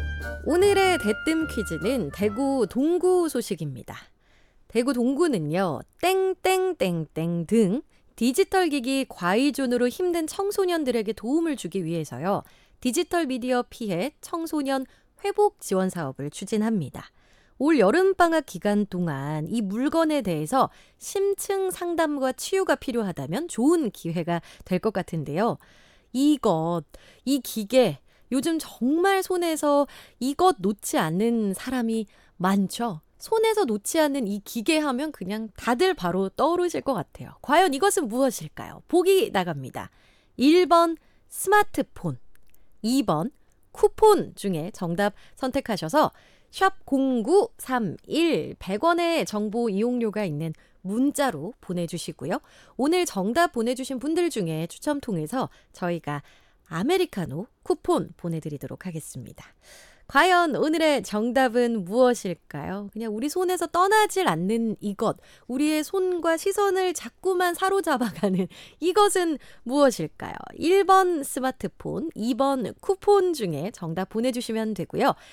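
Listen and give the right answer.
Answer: 1: 스마트폰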